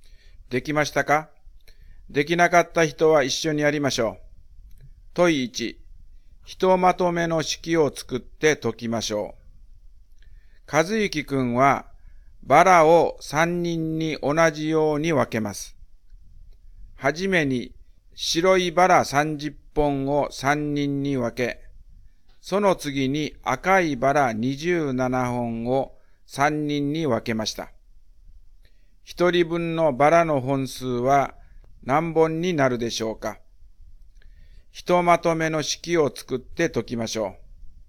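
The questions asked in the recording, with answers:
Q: 一人分のバラの本数は何本になるでしょうか?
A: 19本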